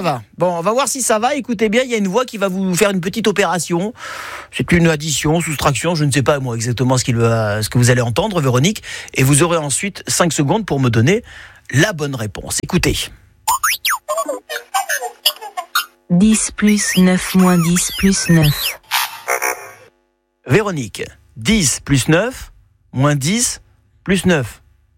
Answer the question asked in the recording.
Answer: 19 moins 10, 9. 18.